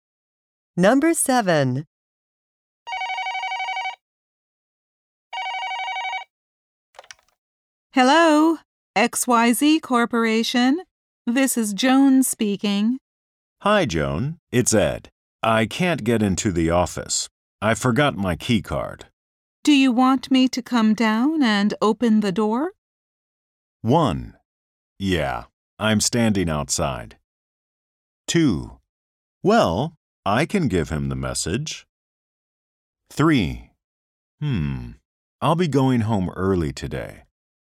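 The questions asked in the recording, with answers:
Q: Do you want me to come down and open the door?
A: 1: Yeah, I'm standing outside.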